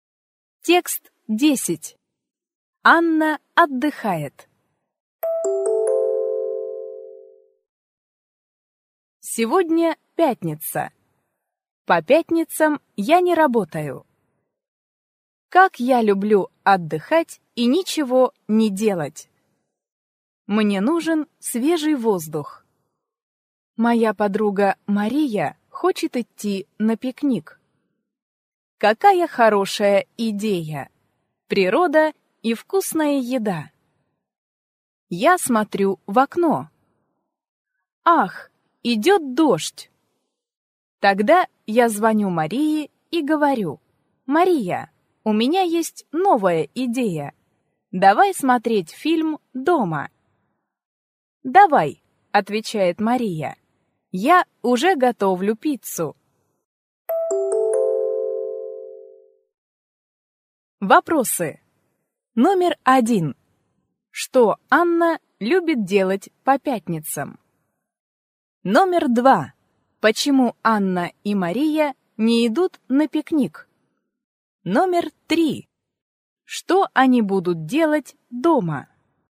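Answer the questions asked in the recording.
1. Отдыхать и ничего не делать
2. Идёт дождь
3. Смотреть фильм (и есть пиццу)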